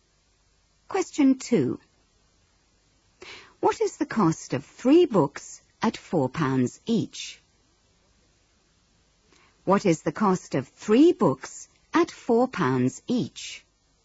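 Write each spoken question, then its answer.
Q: What is the cost of 3 books at £4 each?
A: £12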